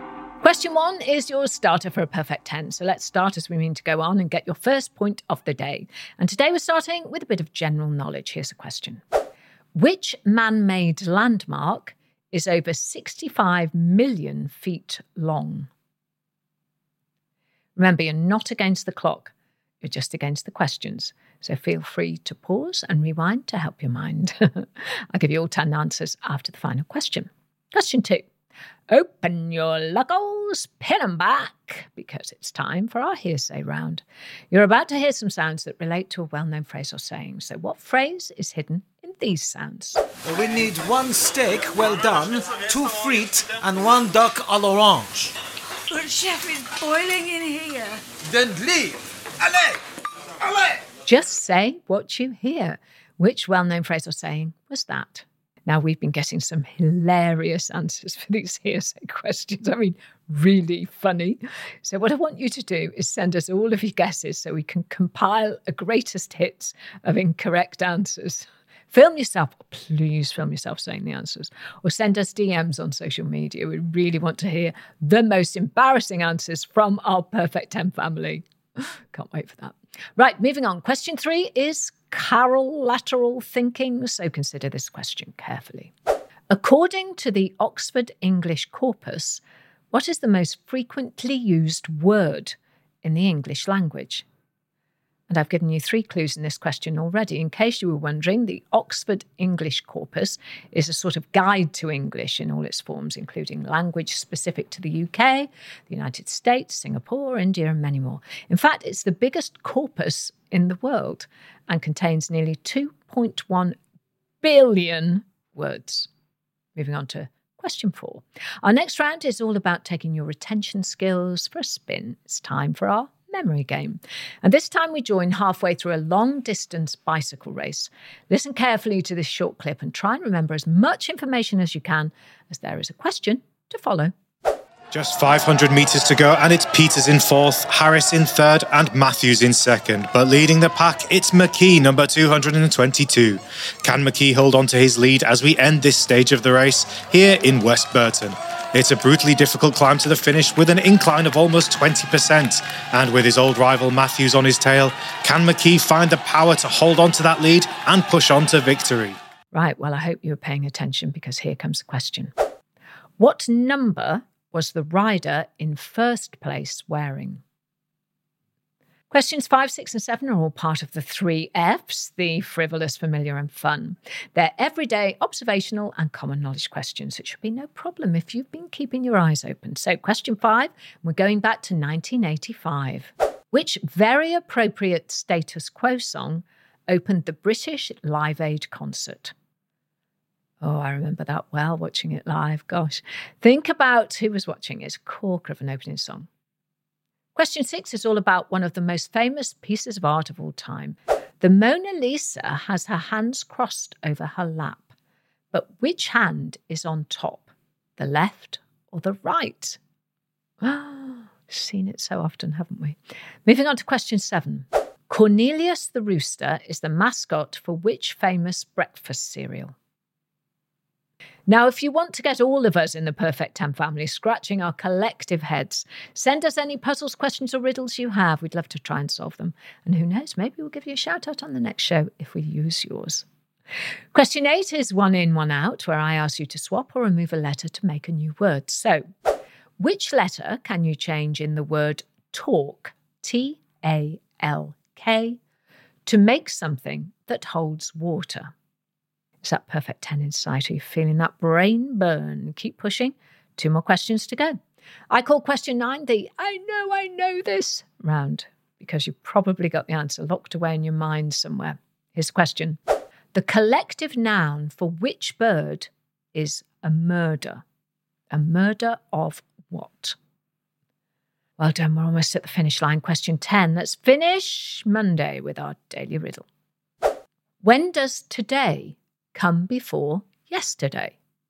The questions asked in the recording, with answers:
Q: What number was the rider in first place wearing?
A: the answer, if you could recall it, was 222.